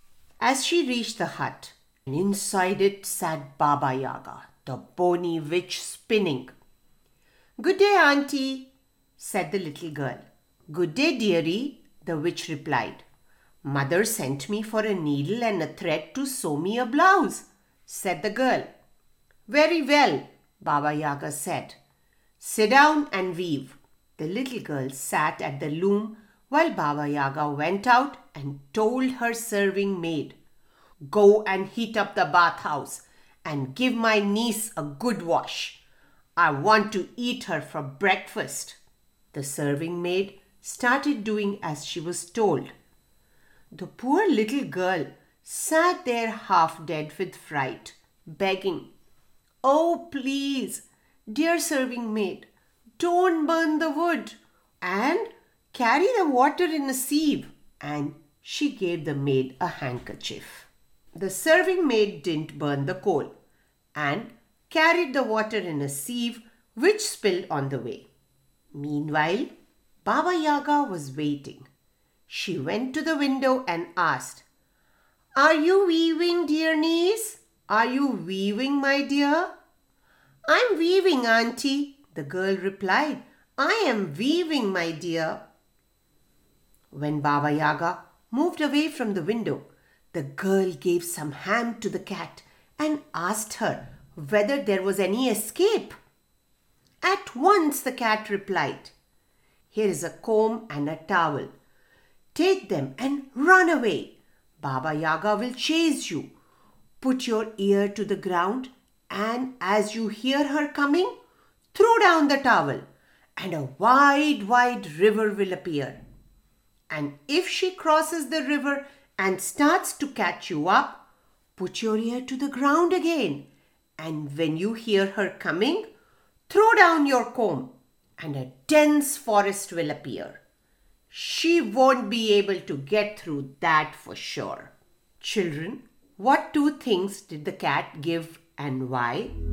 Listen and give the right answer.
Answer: Yes, she gave a towel for the river to appear and a comb for a forest to appear.